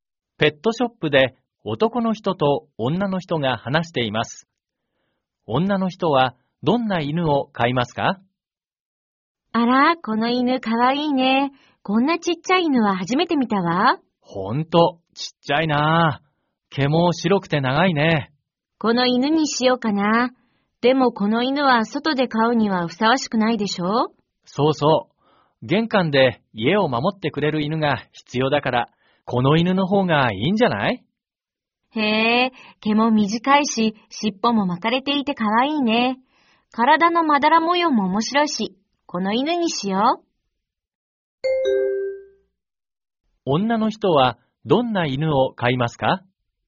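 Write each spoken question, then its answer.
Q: 女の人はどんな犬を飼いますか?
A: 毛が短く、尻尾が巻いていて、まだら模様の犬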